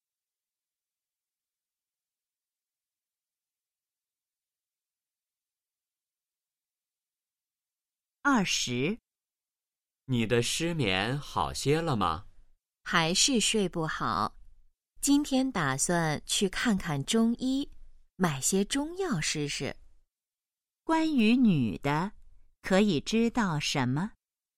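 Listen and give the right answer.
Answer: 她失眠,打算去看中医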